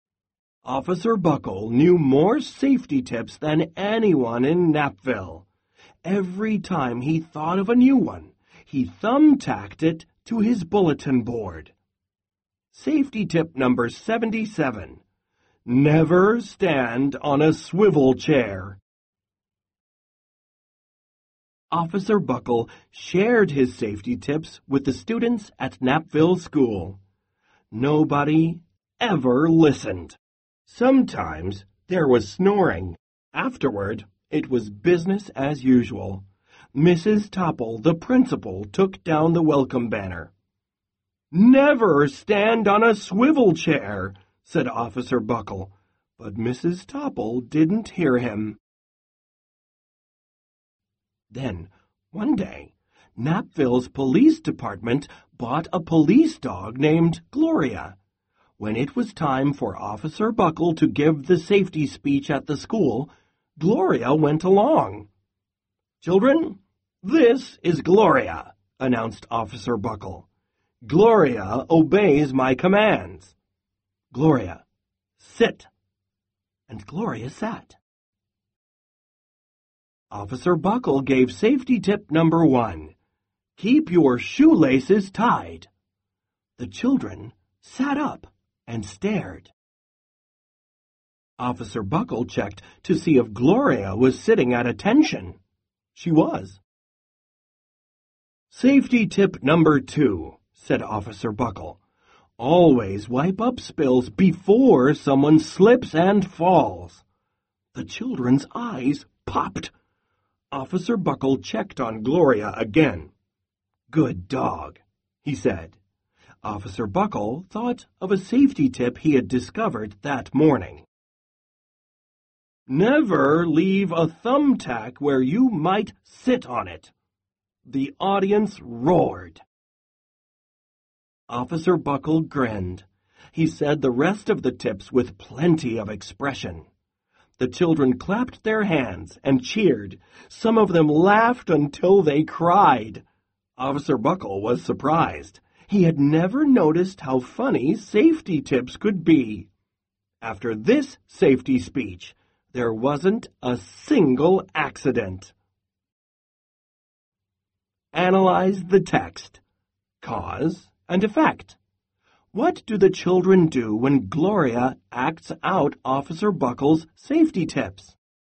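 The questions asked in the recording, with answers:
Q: What do the children do when Gloria acts out Officer Buckle's safety tips?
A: They sit up, stare, clap, cheer and laugh.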